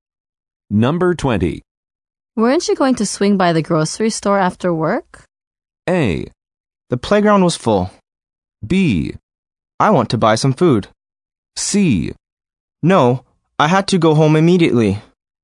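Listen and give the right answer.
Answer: C: No, I had to go home immediately.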